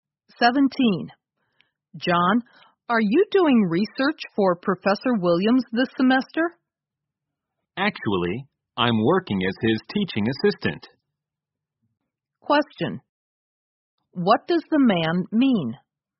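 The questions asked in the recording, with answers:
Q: What does the man mean?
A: He isn't doing research for Professor Williams; he is his teaching assistant.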